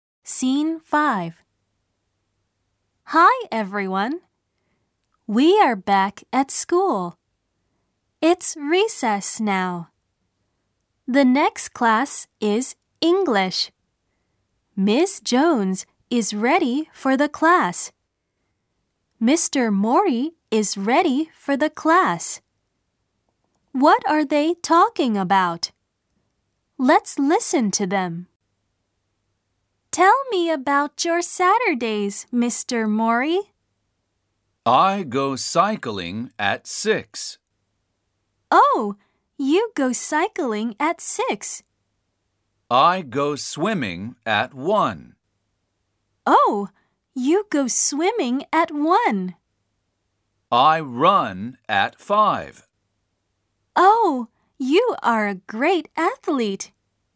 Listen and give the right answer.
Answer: They were talking about the weekend.